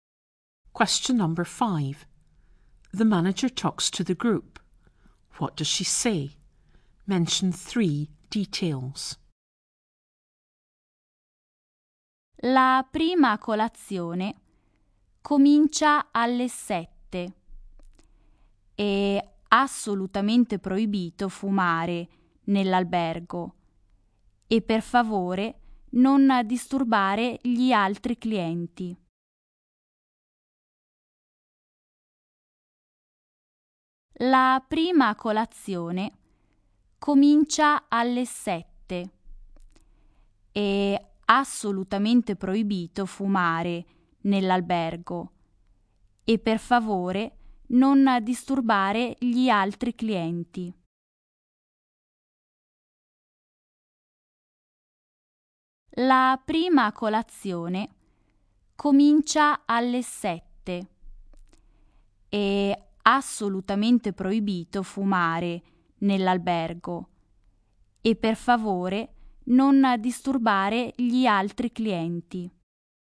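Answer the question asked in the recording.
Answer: Breakfast starts at 7; smoking is strictly forbidden in the hotel; do not disturb the other guests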